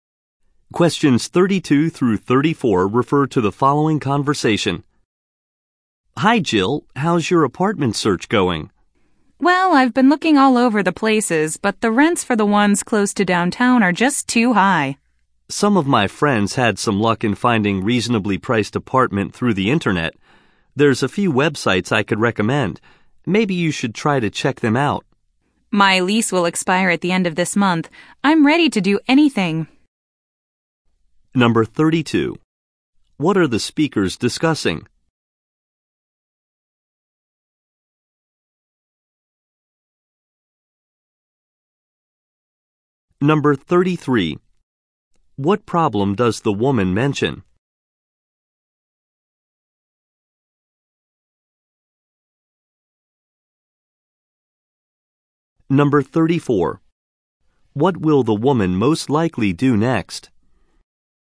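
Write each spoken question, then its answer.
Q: What are the speakers discussing?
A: The woman's apartment search

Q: What problem does the woman mention?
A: Rents near downtown are too high

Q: What will the woman most likely do next?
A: Check the recommended websites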